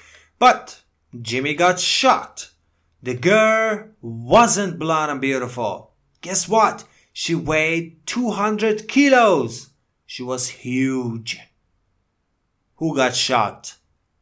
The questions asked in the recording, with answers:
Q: Who got shot?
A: Jimmy. Jimmy got shot.